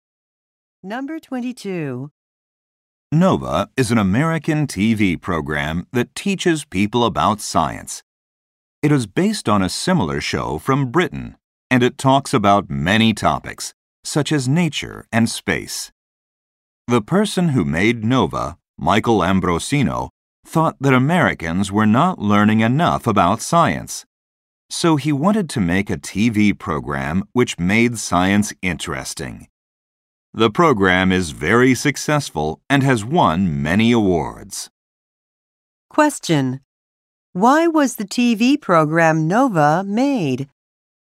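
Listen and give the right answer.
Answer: Americans were not learning enough about science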